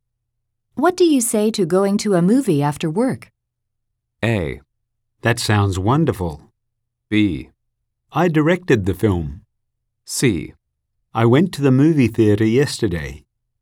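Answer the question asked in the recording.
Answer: A: That sounds wonderful.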